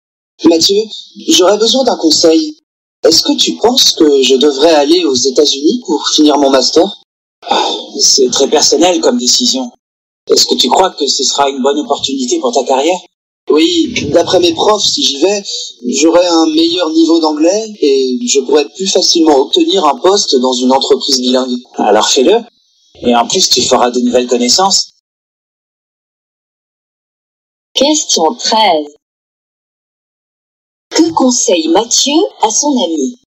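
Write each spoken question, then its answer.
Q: Que conseille Mathieu à son ami?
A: D'aller aux États-Unis pour finir son master.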